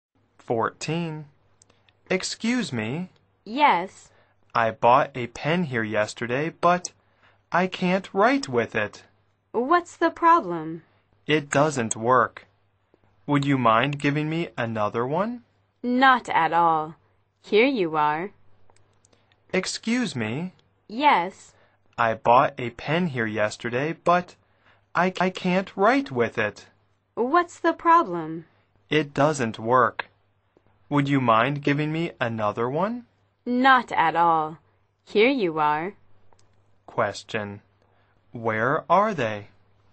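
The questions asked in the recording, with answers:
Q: Where are they?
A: In a shop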